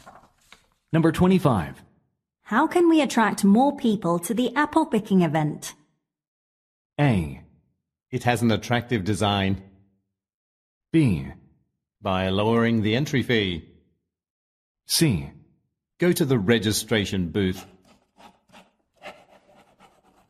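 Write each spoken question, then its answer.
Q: How can we attract more people to the apple picking event?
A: B: By lowering the entry fee.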